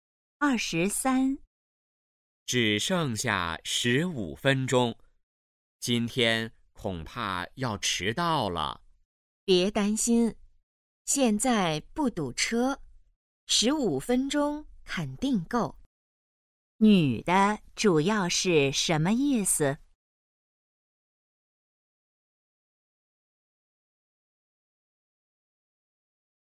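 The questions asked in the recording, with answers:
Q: 女的主要是什么意思?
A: 不会迟到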